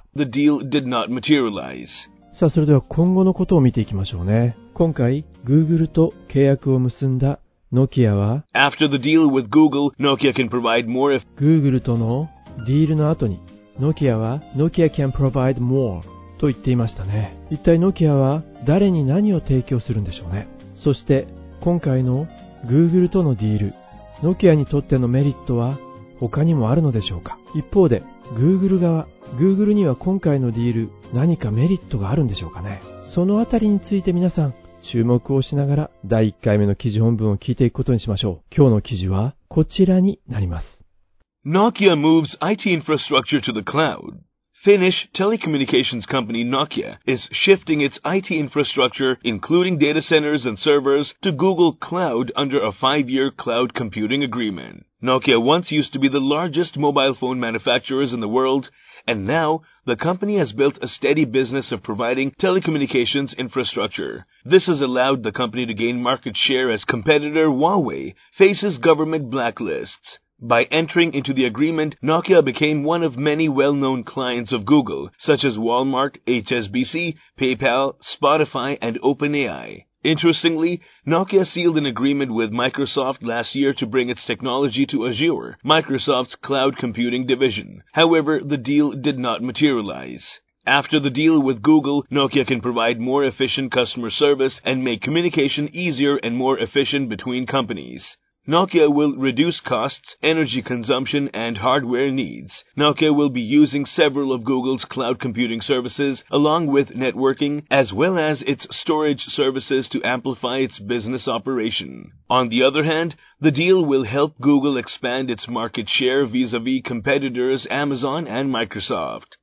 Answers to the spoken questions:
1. After the deal with Google, Nokia can provide more efficient customer service and make communication easier and more efficient between companies.
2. On the other hand, the deal will help Google expand its market share vis-à-vis competitors Amazon and Microsoft.